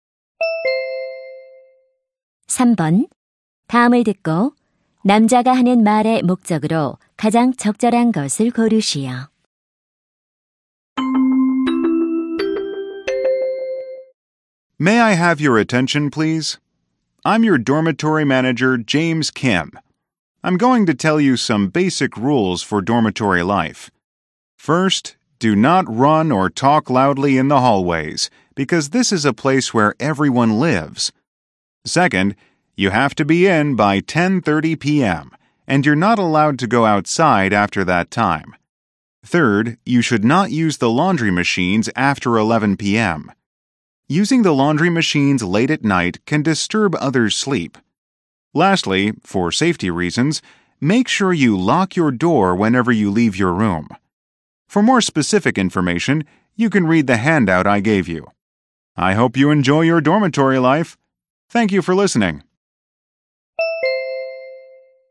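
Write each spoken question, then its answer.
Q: 다음을 듣고 남자가 하는 말의 목적으로 가장 적절한 것을 고르시오.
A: 기숙사 생활 규칙을 안내하려고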